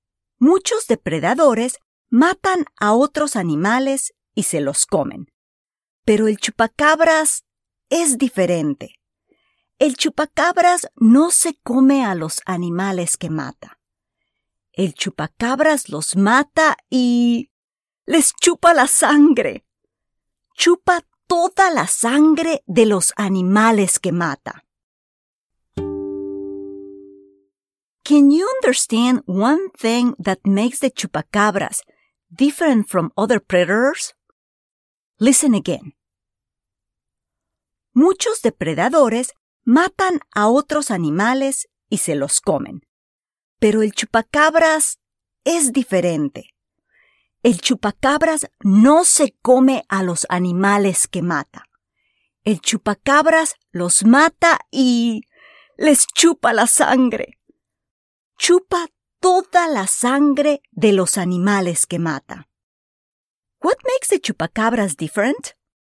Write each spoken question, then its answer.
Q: What makes the chupacabras different?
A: If you said that it doesn't eat the animals it kills, but rather sucks all of their blood, you understood.